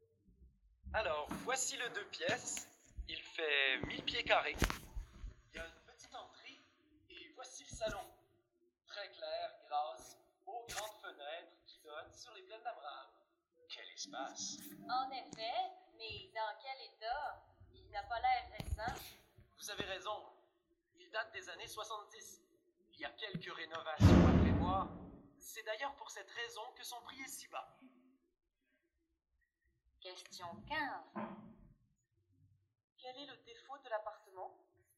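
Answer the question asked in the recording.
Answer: Il est vieux et a besoin de rénovations (il date des années 70).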